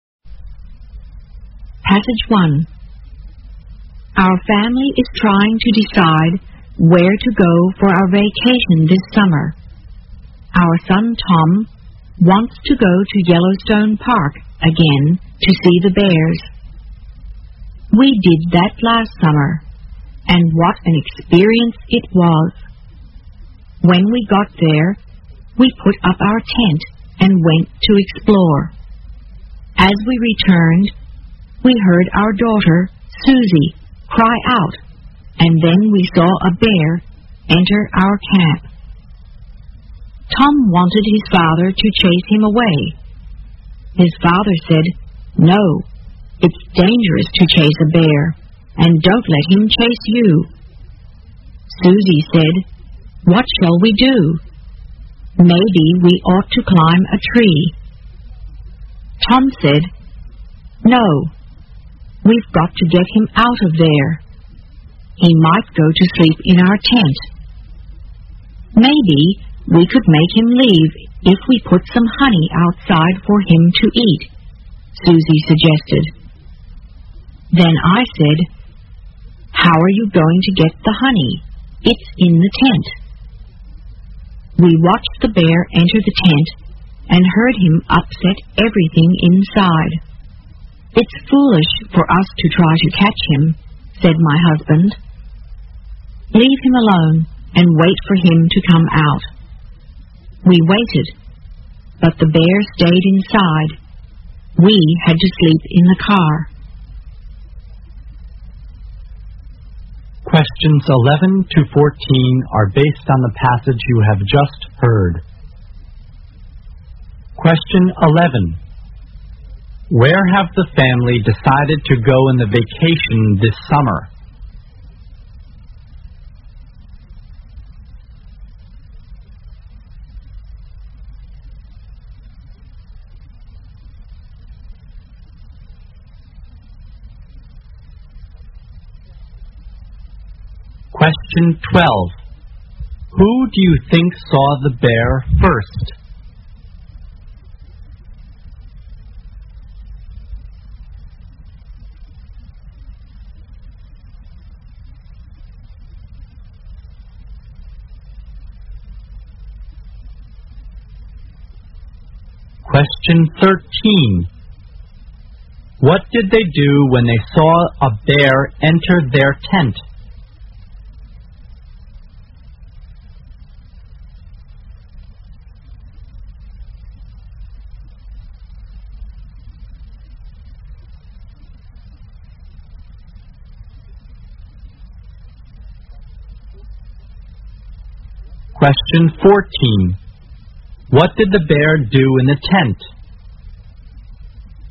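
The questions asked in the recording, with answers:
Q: Who do you think saw the bear first?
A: Susie

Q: What did they do when they saw a bear enter their tent?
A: They left it alone and waited for it to come out

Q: What did the bear do in the tent?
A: It upset everything inside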